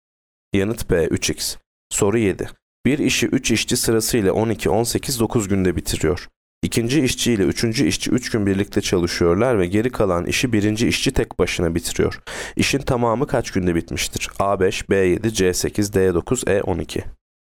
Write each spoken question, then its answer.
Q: İşin tamamı kaç günde bitmiştir?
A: Yanıt D 9.